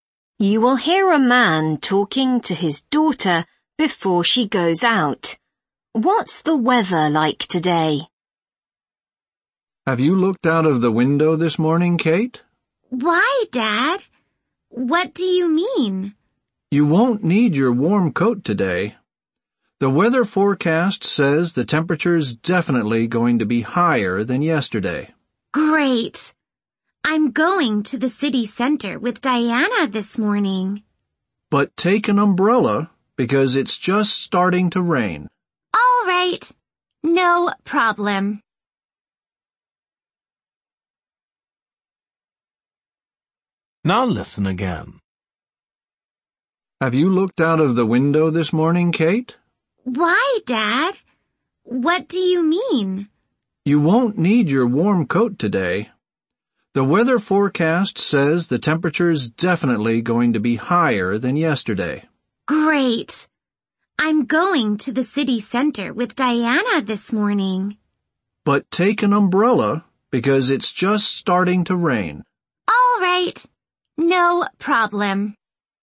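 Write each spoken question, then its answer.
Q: What's the weather like today?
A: Warmer than yesterday, and starting to rain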